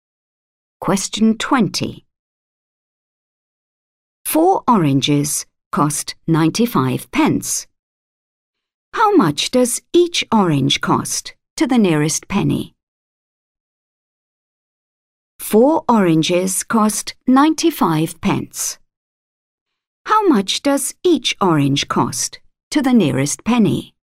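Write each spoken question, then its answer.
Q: 4 oranges cost 95 pence. How much does each orange cost to the nearest penny?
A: 24p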